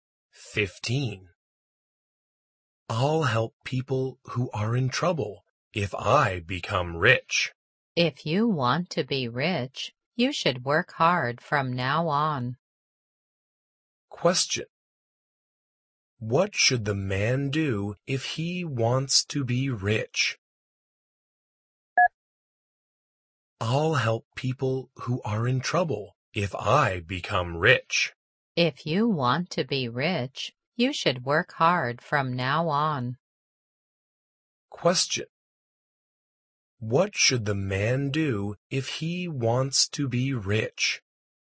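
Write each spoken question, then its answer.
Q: What should the man do if he wants to be rich?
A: Work hard from now on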